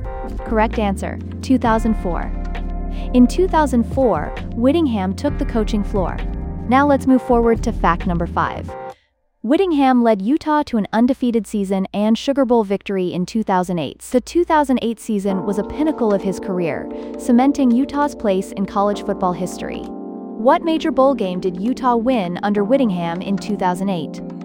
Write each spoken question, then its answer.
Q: What major bowl game did Utah win under Whittingham in 2008?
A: Correct answer, Sugar Bowl.